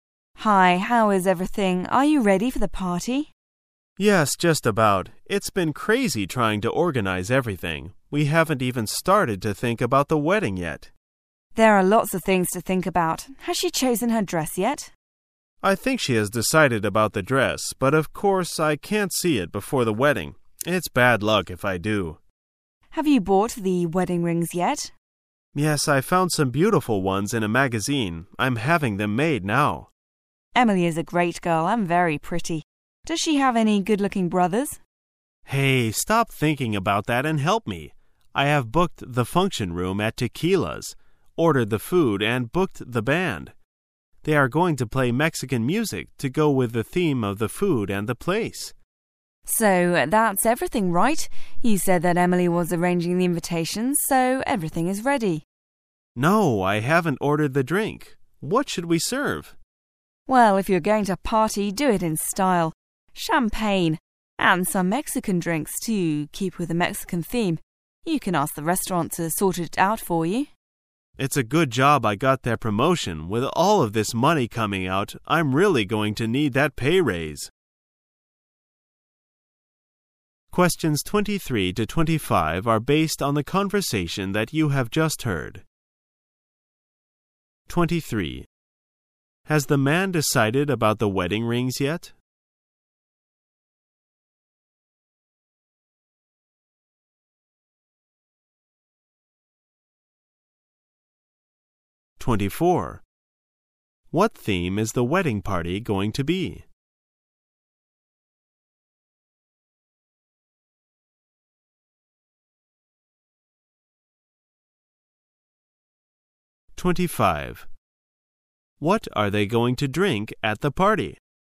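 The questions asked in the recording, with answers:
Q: Has the man decided about the wedding rings yet?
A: Yes, he found some in a magazine and is having them made

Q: What theme is the wedding party going to be?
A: Mexican

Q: What are they going to drink at the party?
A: Champagne and Mexican drinks

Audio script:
[解析] 23-25 W: Hi, how is everything? Are you ready for the party? M: Yes, just about. It's been crazy trying to organize everything, we haven't even started to think about the wedding yet! W: There are lots of things to think about. Has she chosen her dress yet? I think she has decided about thee dress, but of course, I can't see it before the wed ding. It's bad luck if I do. W: Have you bought the wedding rings yet? M: Yes, I found some beautiful ones in a magazine, I'm having them made now. W: Emily is a great girl, and very pretty. Does she have any good looking brothers? 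M: Hey! Stop thinking about that and help me. I have booked the function room at Tequilas' , ordered the food, and booked the band. They are going to play Mexican music, to go with the theme of the food and the place. W: So, that's everything, right? You said that Emily was arranging the invitations, so everything is ready. M: No! I haven't ordered the drink. What should we serve? W: Well, if you are going to party, do it in style. Champagne! And some Mexican drinks, to keep with the Mexican theme. You can ask the restaurant to sort it our for you. M: It's a good job I got that promotion, with all of this money coming out I'm really going to need that pay rise!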